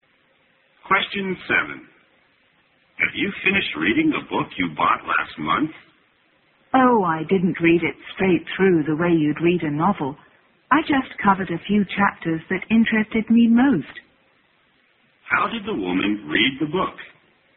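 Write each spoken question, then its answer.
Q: How did the woman read the book?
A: She read only a few chapters that interested her most.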